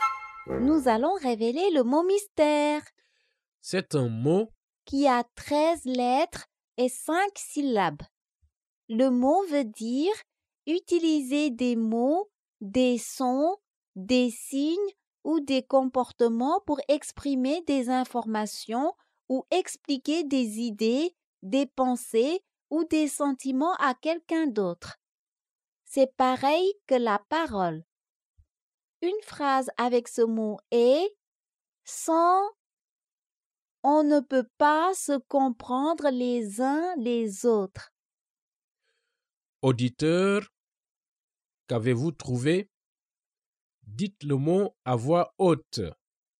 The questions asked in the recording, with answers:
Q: Auditeur, qu'avez-vous trouvé?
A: Le mot mystère est communication.